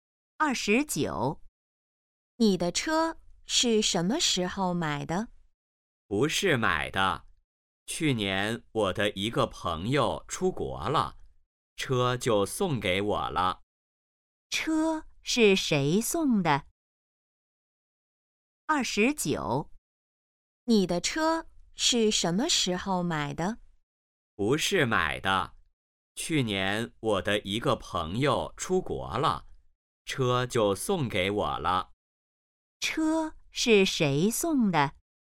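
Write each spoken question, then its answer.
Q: 车是谁送的?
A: 朋友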